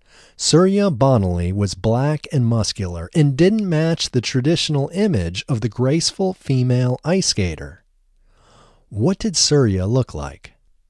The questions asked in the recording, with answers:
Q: What did Surya look like?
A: Surya was black and muscular.